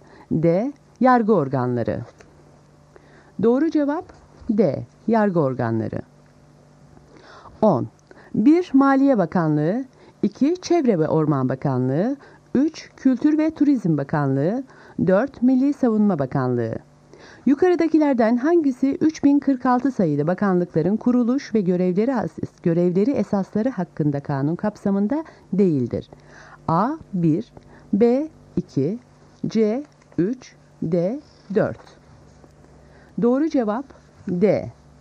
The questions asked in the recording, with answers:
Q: Yukarıdakilerden hangisi 3046 sayılı bakanlıkların kuruluş ve görevleri esasları hakkında kanun kapsamında değildir?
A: Doğru cevap D. 4.